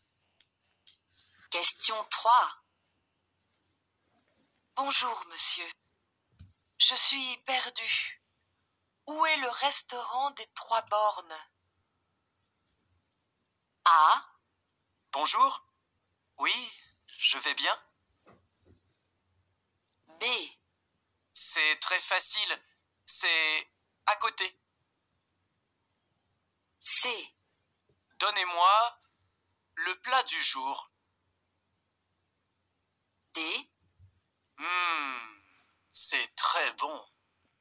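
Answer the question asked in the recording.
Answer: B: C'est très facile. C'est à côté.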